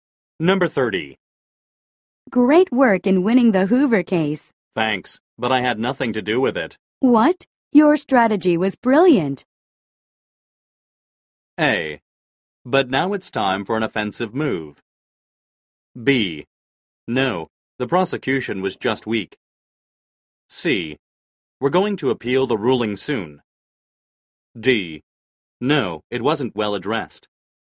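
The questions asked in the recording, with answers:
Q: What? Your strategy was brilliant.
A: B: No, the prosecution was just weak.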